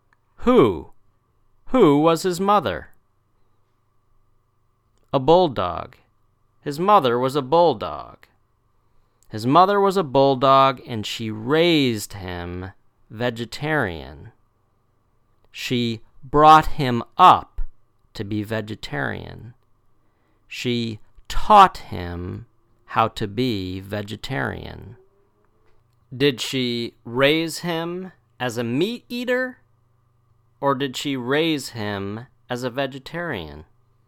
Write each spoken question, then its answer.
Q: Did she raise him as a meat eater, or did she raise him as a vegetarian?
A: A vegetarian. She raised him as a vegetarian.